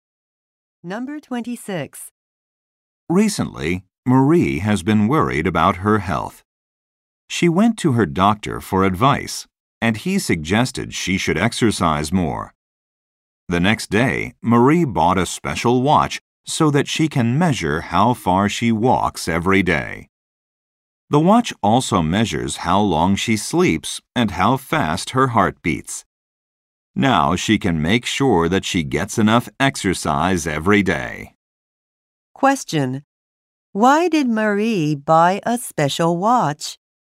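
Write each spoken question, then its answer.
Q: Why did Marie buy a special watch?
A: To measure how far she walks so she gets enough exercise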